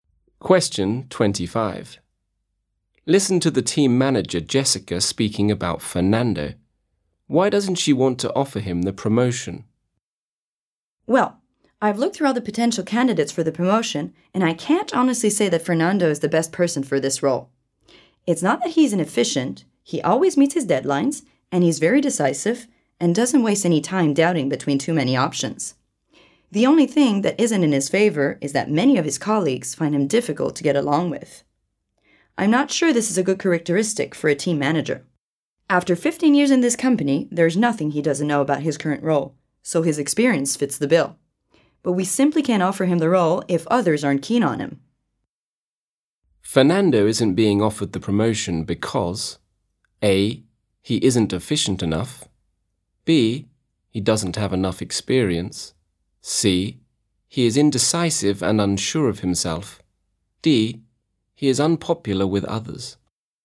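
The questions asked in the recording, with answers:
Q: Why doesn't she want to offer him the promotion?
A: D: he is unpopular with others.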